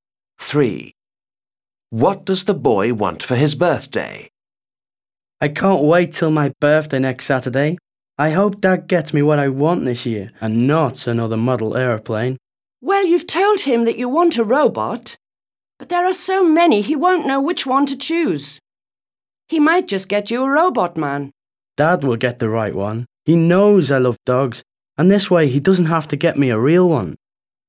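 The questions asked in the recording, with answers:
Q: What does the boy want for his birthday?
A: A robot dog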